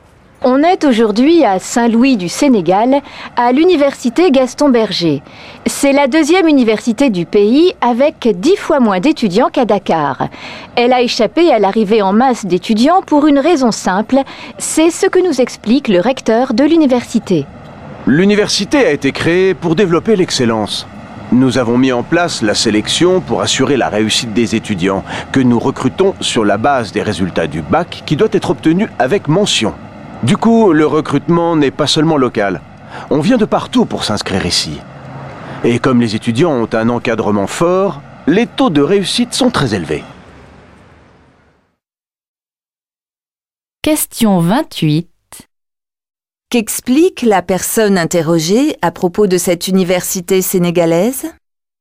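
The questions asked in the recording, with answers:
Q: Qu'explique la personne interrogée à propos de cette université sénégalaise ?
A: Elle sélectionne ses étudiants sur la base des résultats du bac, obtenu avec mention.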